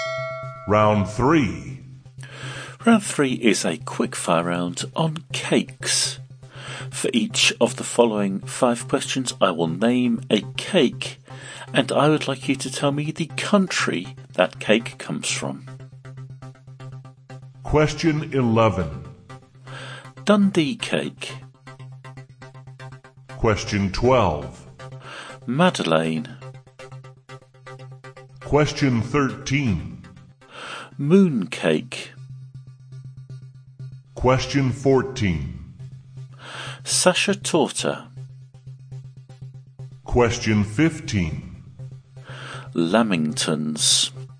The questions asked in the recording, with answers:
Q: Dundee cake.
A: Dundee cake, comes from Scotland, or I'll accept the UK as well.

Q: Madeleine.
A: Number 12, Madeleine, comes from France.

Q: Mooncake.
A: Number 13, mooncake, comes from China.

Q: Sasha Torta.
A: Number 14, Sasha Torta, comes from Austria.

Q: Lamingtons.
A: And number 15, Lamingtons, are from Australia.